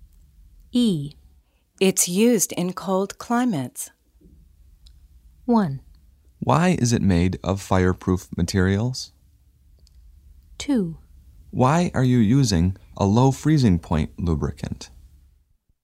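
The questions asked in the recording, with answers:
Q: It's used in cold climates.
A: 2: Why are you using a low freezing point lubricant?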